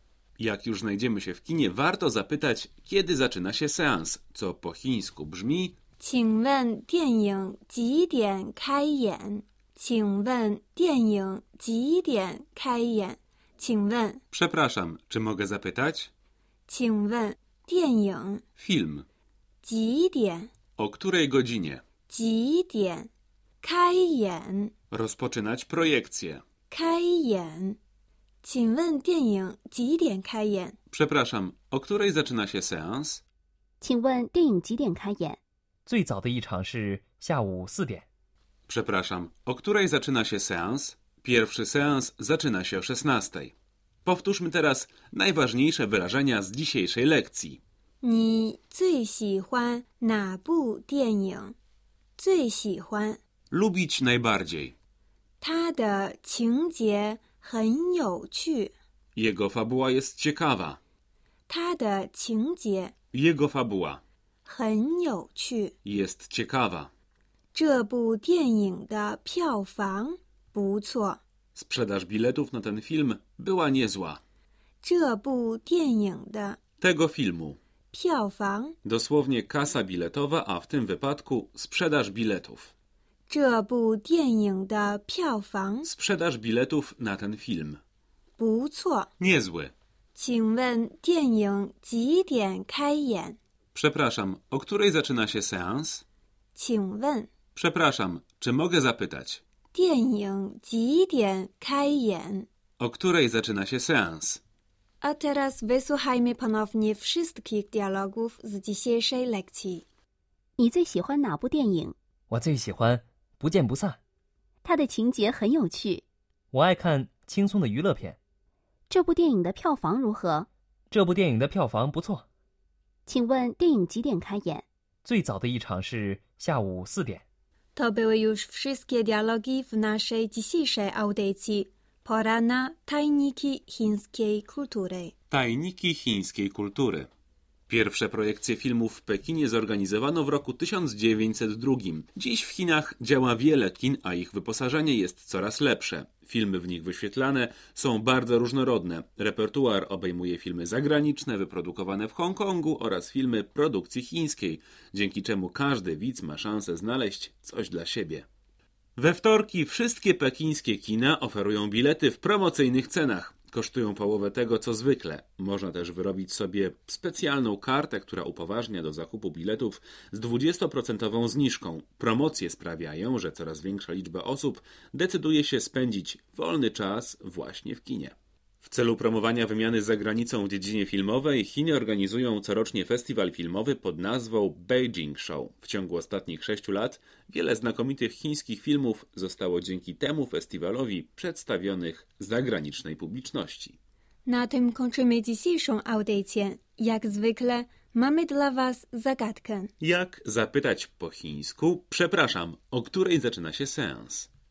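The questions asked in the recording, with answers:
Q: Jak zapytać po chińsku? Przepraszam, o której zaczyna się seans?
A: 请问电影几点开演?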